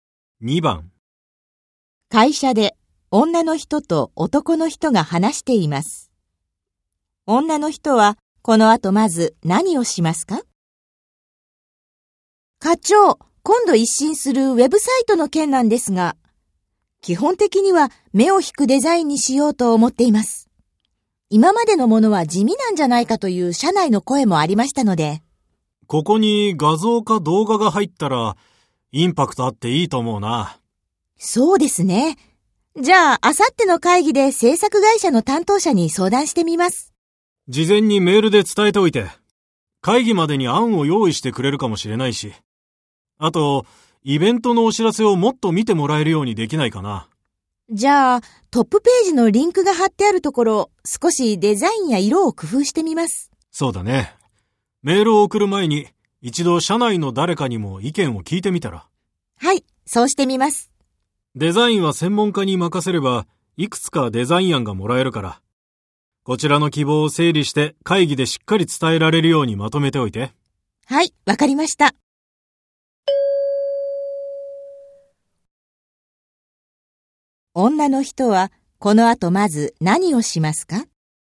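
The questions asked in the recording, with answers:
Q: 女の人はこの後まず何をしますか?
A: 社内の誰かに意見を聞く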